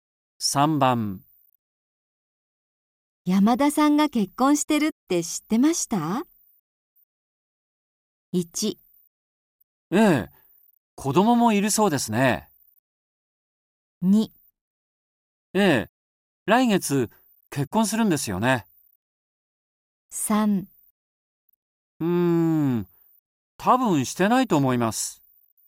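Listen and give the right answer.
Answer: 1: ええ、子供もいるそうですね。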